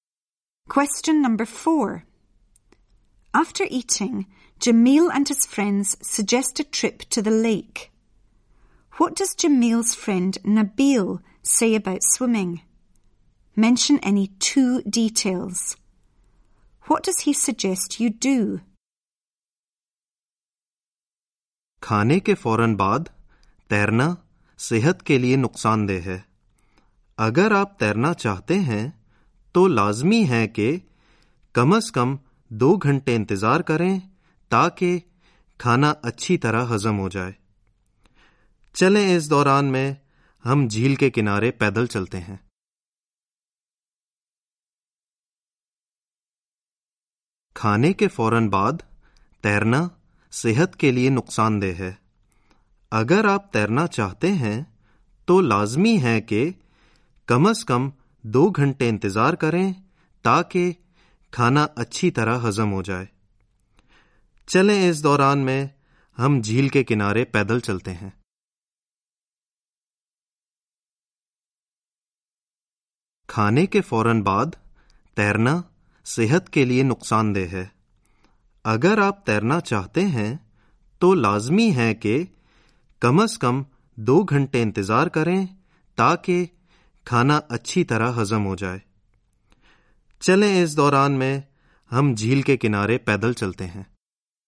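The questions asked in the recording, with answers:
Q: What does Jamil's friend Nabil say about swimming?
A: Swimming straight after eating is bad for your health; you must wait at least 2 hours so the food can digest

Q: What does he suggest you do?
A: Go for a walk along the edge of the lake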